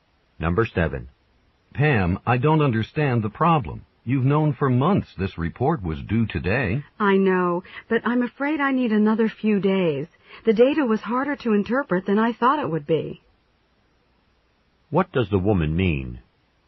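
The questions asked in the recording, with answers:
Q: What does the woman mean?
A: She needs a few more days to finish the report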